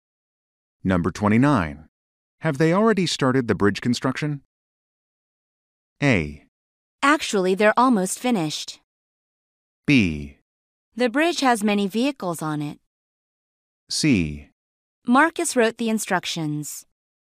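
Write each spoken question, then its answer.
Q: Have they already started the bridge construction?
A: A: Actually, they're almost finished.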